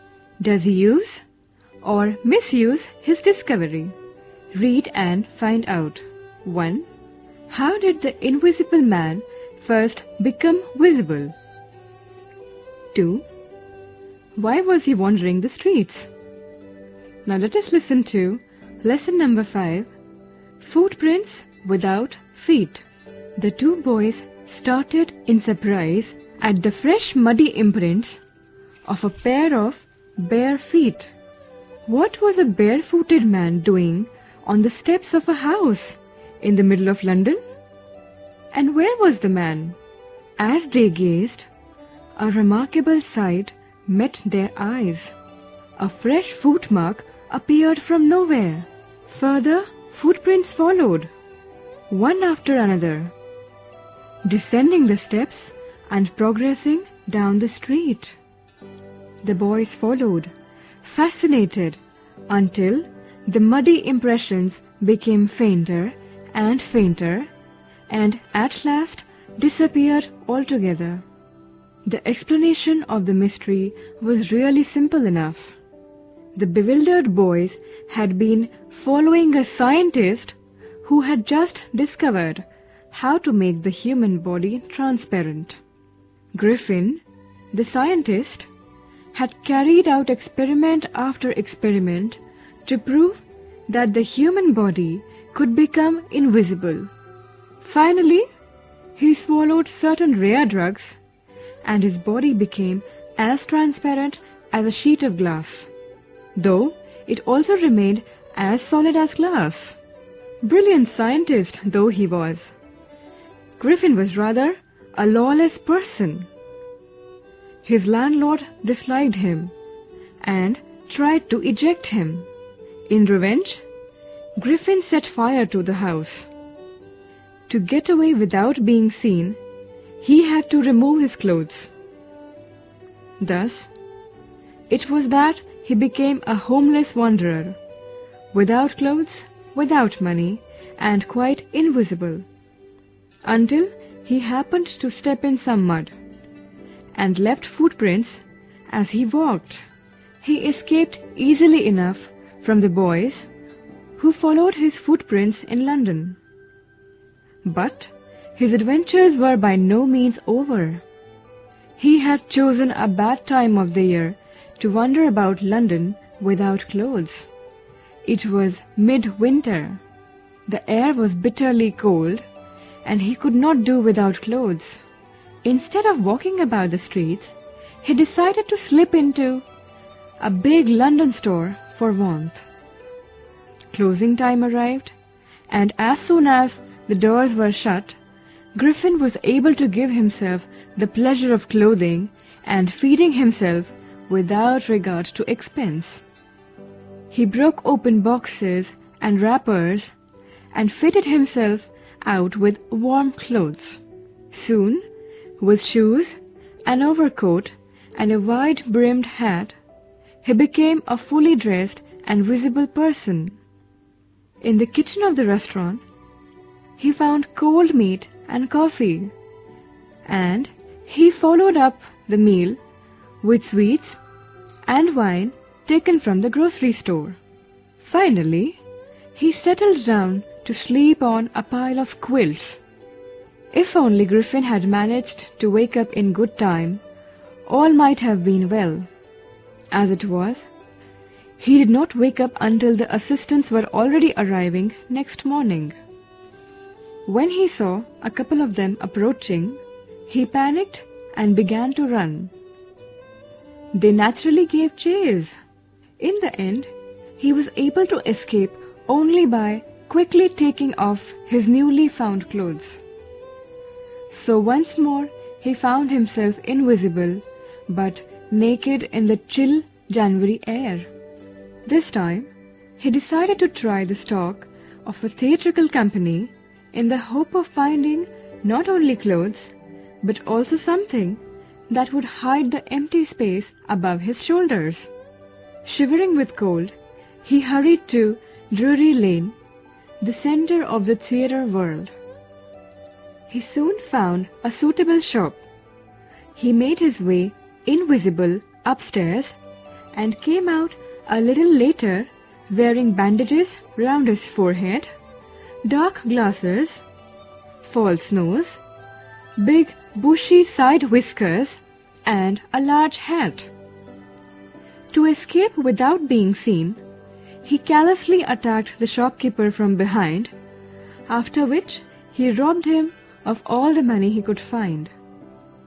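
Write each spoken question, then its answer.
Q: How did the invisible man first become visible?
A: By putting on clothes he took in a big London store

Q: Why was he wandering the streets?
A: He set fire to his landlord's house and took off his clothes to escape unseen, so he became a homeless wanderer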